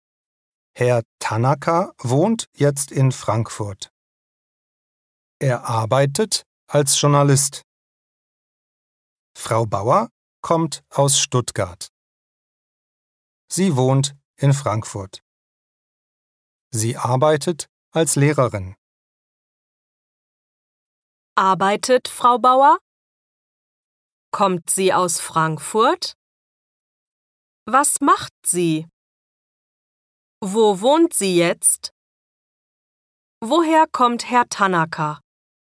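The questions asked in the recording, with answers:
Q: Arbeitet Frau Bauer?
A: Ja, sie arbeitet.

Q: Kommt sie aus Frankfurt?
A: Nein, sie kommt aus Stuttgart.

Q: Was macht sie?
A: Sie arbeitet als Lehrerin.

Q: Wo wohnt sie jetzt?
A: In Frankfurt.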